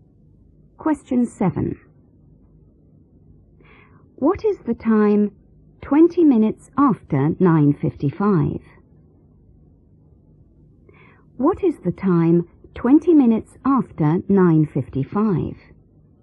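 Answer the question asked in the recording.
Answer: 10:15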